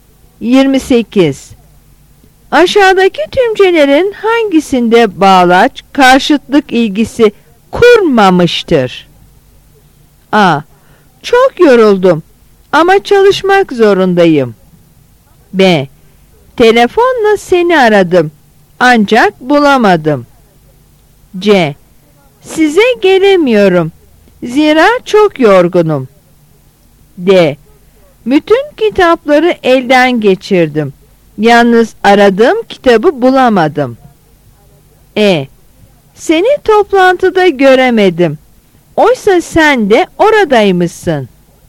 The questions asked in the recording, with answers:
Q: Aşağıdaki tümcelerin hangisinde bağlaç karşıtlık ilgisi kurmamıştır?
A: Yanıt C.